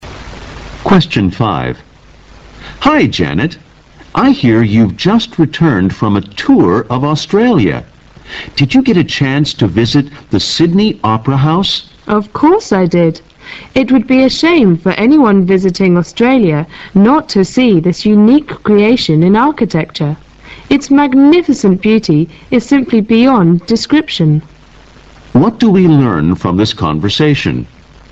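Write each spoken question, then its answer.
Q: What do we learn from this conversation?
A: Janet visited the Sydney Opera House and was greatly impressed by it.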